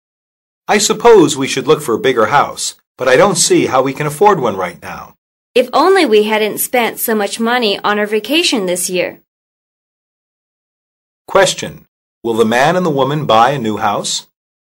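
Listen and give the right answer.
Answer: No, not right now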